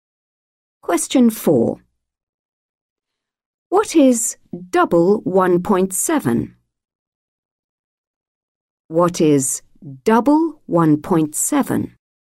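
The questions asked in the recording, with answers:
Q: What is double 1.7?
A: 3.4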